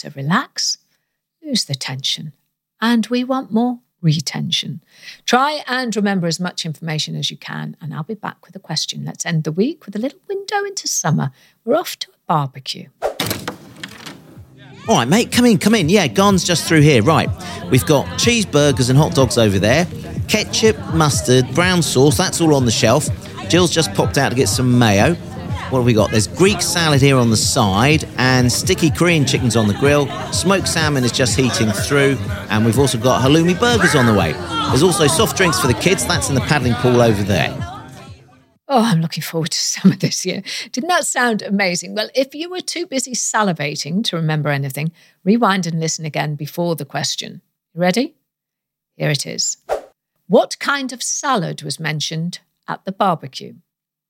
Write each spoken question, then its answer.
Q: What kind of salad was mentioned at the barbecue?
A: The answer I was looking for was Greek salad.